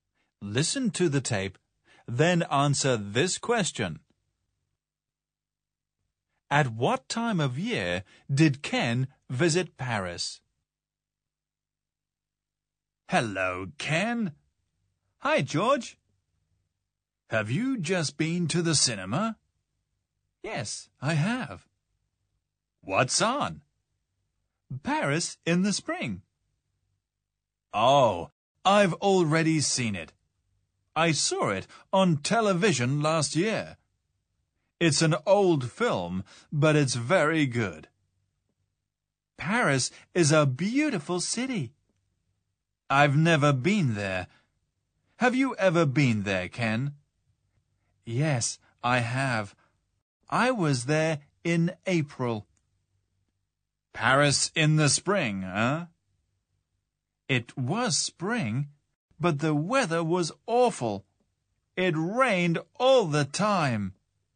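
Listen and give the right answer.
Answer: In the spring (April)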